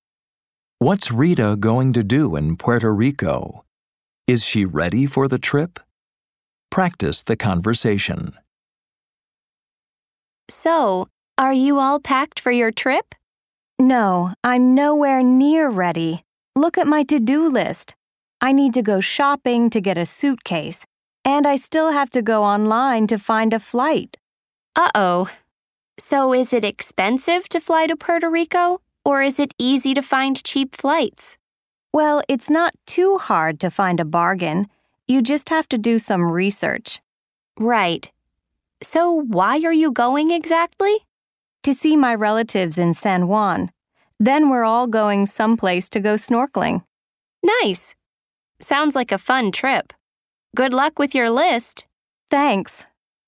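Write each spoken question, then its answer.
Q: What's Rita going to do in Puerto Rico?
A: See her relatives in San Juan and go snorkeling

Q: Is she ready for the trip?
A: No, she's nowhere near ready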